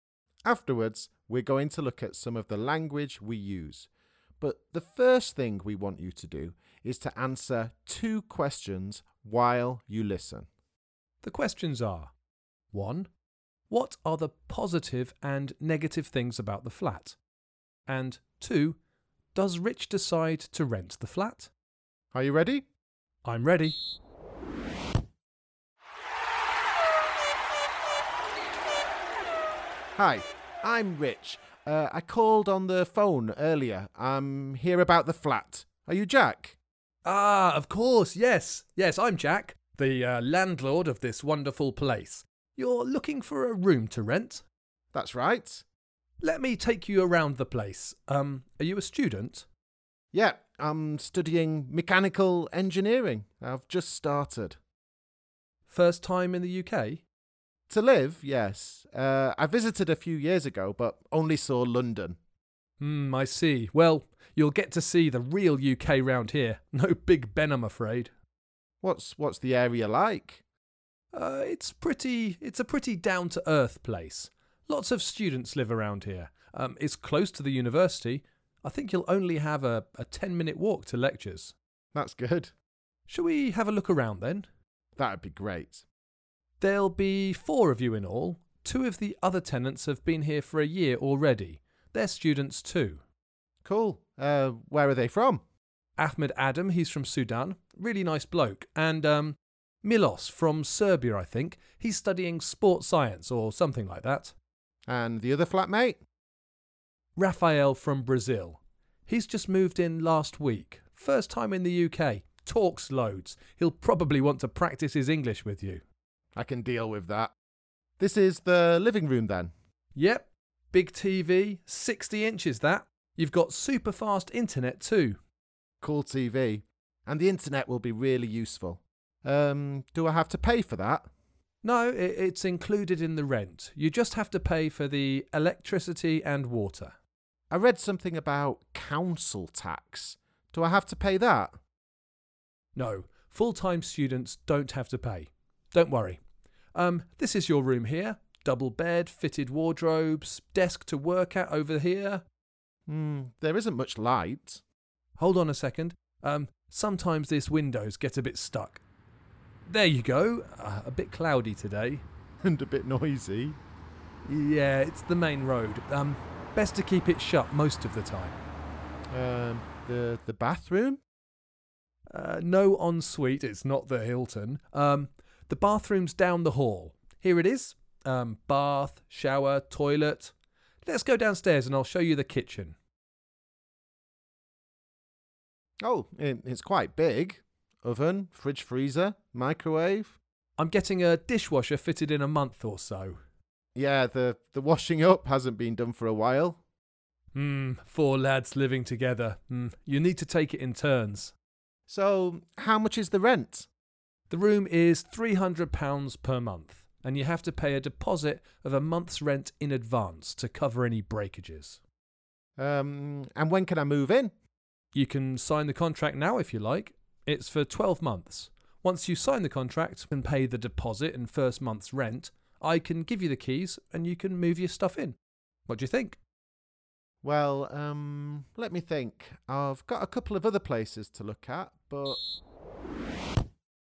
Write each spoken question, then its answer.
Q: What are the positive and negative things about the flat?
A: Well, you seem to like the big telly and fast internet.